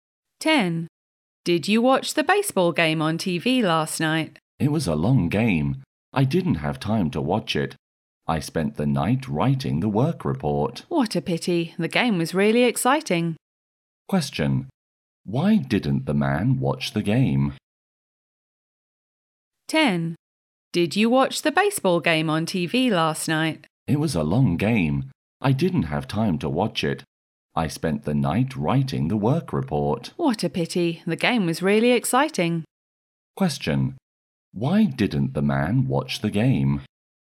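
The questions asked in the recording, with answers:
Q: Why didn't the man watch the game?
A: He spent the night writing the work report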